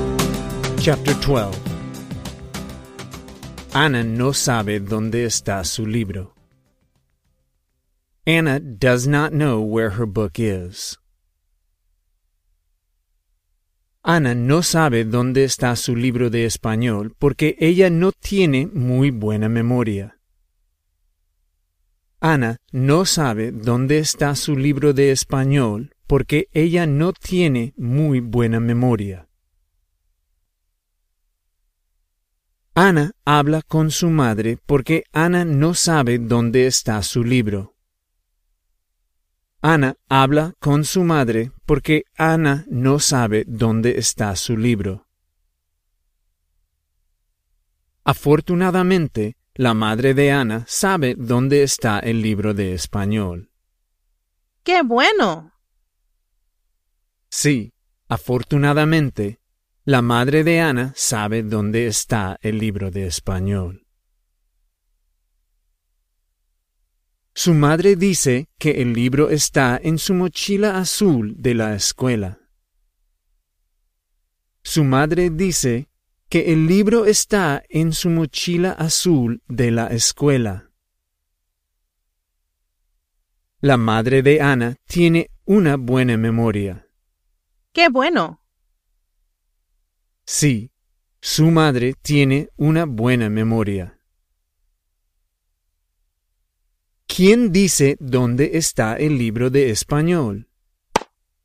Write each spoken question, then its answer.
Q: ¿Quién dice dónde está el libro de español?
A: La madre de Anna dice dónde está el libro.